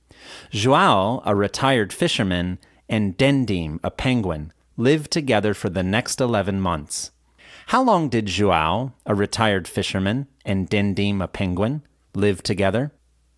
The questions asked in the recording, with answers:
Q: How long did João, a retired fisherman, and Dindim, a penguin, live together?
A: João, a retired fisherman, and Dindim, a penguin, lived together for the next 11 months.